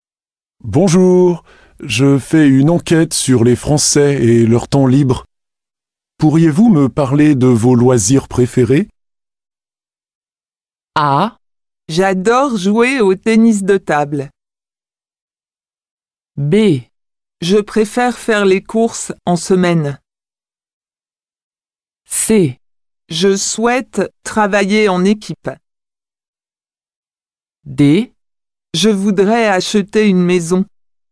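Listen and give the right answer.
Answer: A: J'adore jouer au tennis de table.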